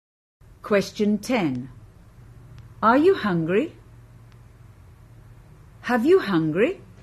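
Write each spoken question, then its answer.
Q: Are you hungry? Have you hungry?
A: A: Are you hungry?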